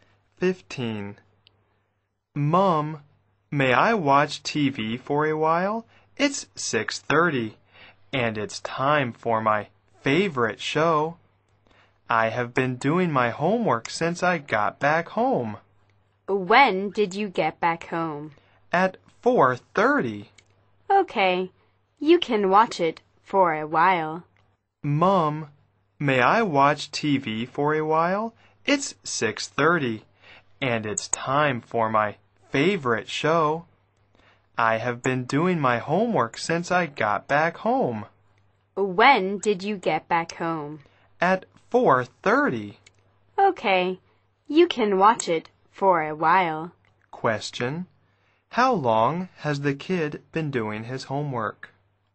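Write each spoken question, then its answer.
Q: How long has the kid been doing his homework?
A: Two hours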